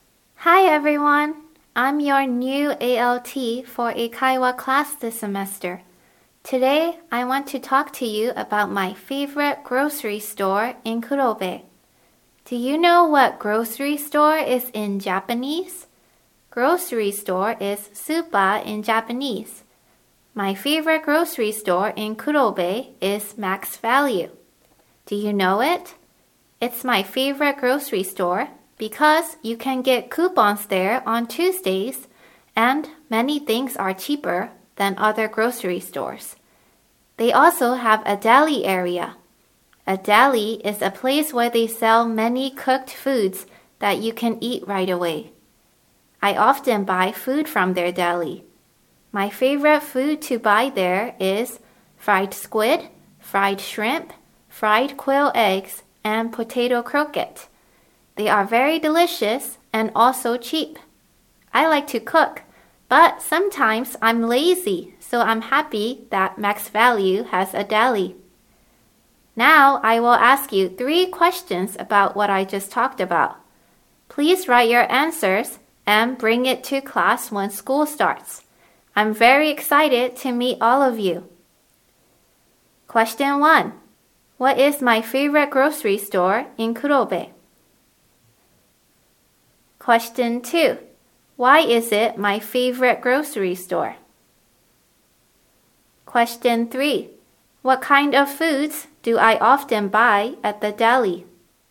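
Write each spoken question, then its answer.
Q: What is my favorite grocery store in Kurobe?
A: Max Value

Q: Why is it my favorite grocery store?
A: You can get coupons there on Tuesdays, and many things are cheaper than at other grocery stores.

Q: What kind of foods do I often buy at the deli?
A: Fried squid, fried shrimp, fried quail eggs, and potato croquette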